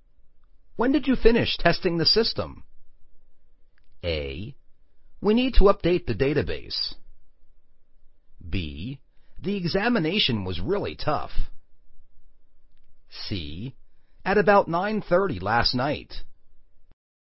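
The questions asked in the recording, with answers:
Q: When did you finish testing the system?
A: C: At about 9:30 last night.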